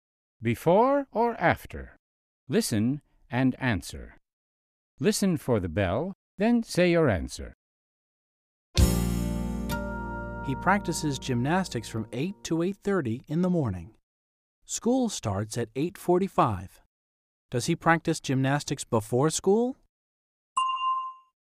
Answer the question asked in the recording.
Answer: Yes, he does. He practices gymnastics before school.